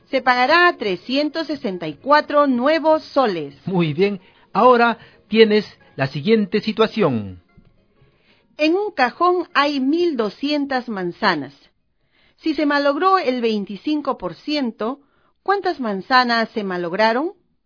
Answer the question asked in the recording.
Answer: Se malograron 300 manzanas.